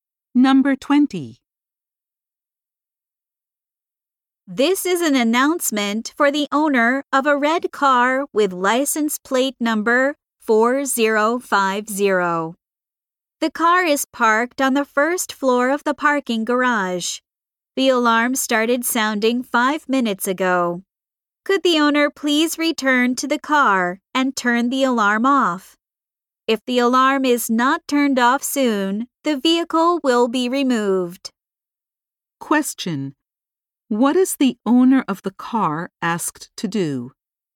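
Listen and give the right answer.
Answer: Return to the car and turn the alarm off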